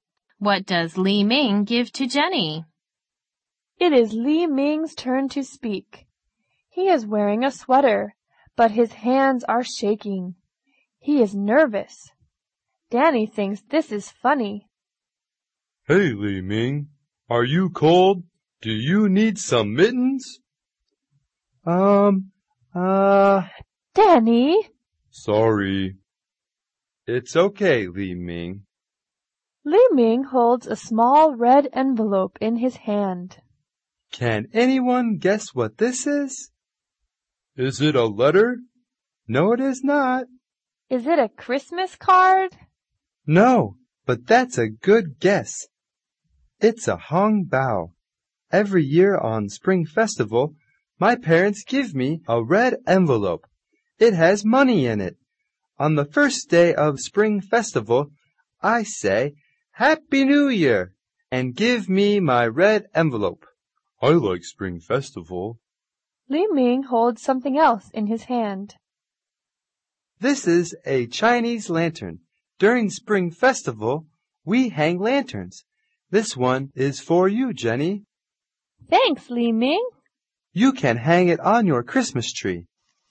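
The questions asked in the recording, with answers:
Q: What does Li Ming give to Jenny?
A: A Chinese lantern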